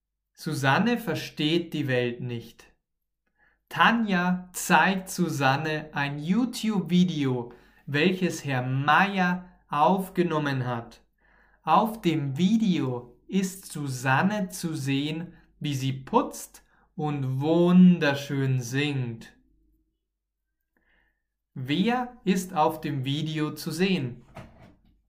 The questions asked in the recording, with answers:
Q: Wer ist auf dem Video zu sehen?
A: Susanne. Auf dem Video ist Susanne zu sehen.